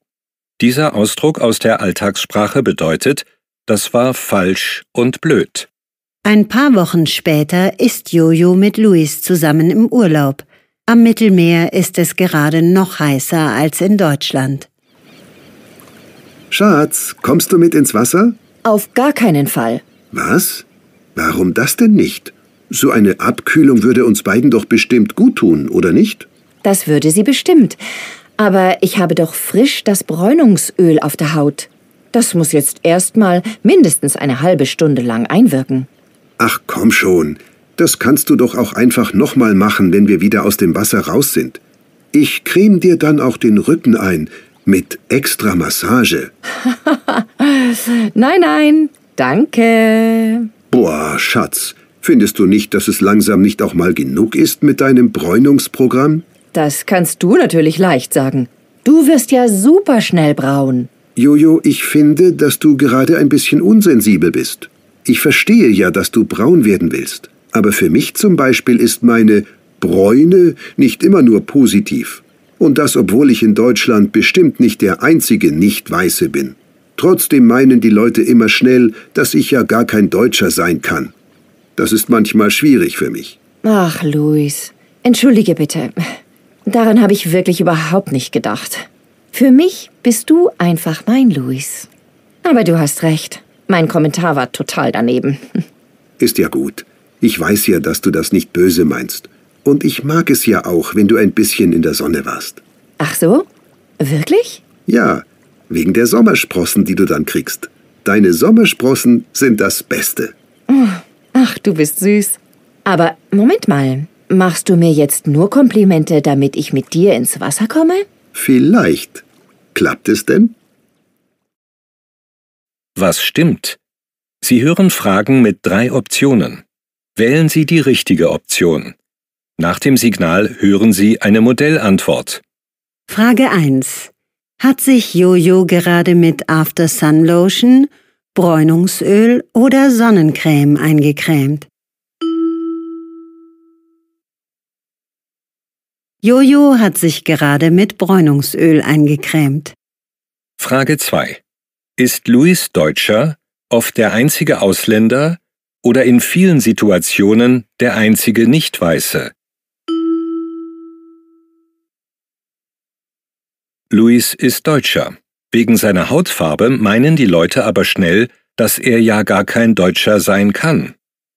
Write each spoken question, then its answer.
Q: Hat sich Jojo gerade mit After Sun Lotion, Bräunungsöl oder Sonnencreme eingecremt?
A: Jojo hat sich gerade mit Bräunungsöl eingecremt.